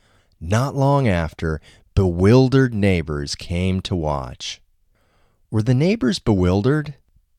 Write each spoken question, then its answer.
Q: Were the neighbors bewildered?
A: Yes, the neighbors were bewildered.